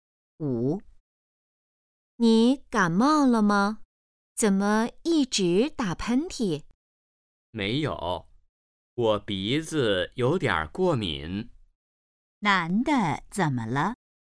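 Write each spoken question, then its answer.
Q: 男的怎么了?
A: 鼻子过敏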